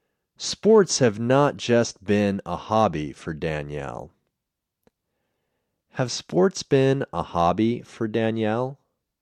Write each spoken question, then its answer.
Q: Have sports been a hobby for Danielle?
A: No, sports haven't been a hobby for Danielle.